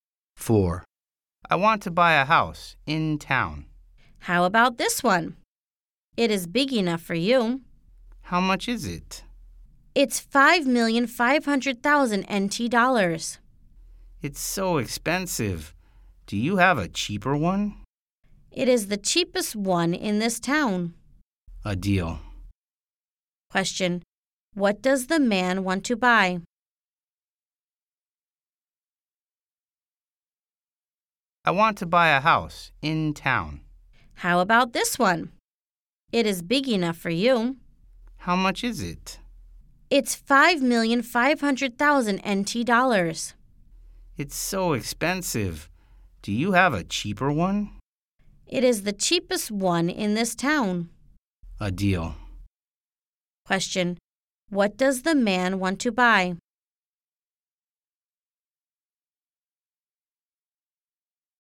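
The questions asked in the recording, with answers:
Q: What does the man want to buy?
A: A house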